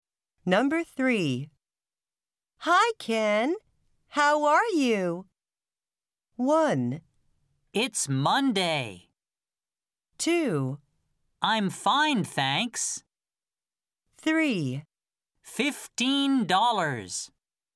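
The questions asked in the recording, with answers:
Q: Hi, Ken. How are you?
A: 2: I'm fine, thanks.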